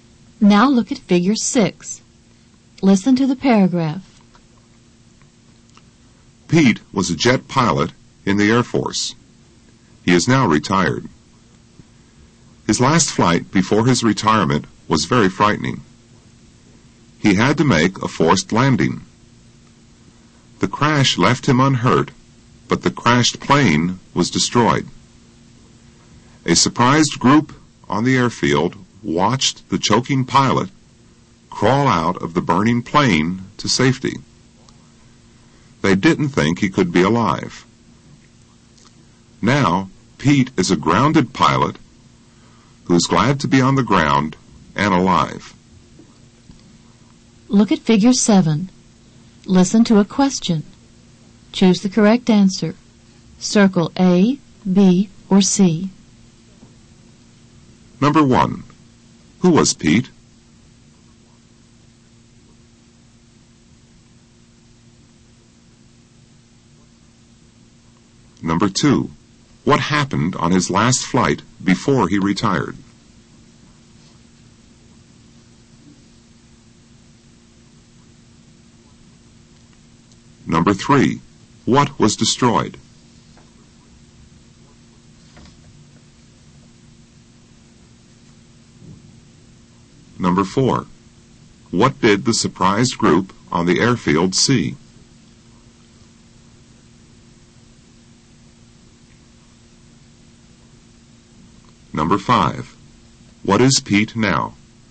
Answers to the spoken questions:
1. Number one is A. Who was Pete?
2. Number two is B.
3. Number three is B.
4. Number four is C.
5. Number five is C.